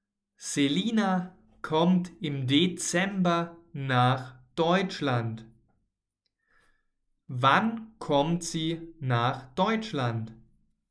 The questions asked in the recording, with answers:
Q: Wann kommt sie nach Deutschland?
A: im Dezember. Selina kommt im Dezember nach Deutschland.